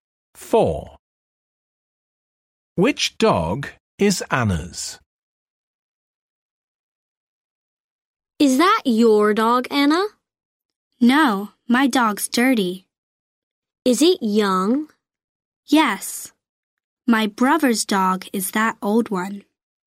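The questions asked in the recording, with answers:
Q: Which dog is Anna's?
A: The young, dirty dog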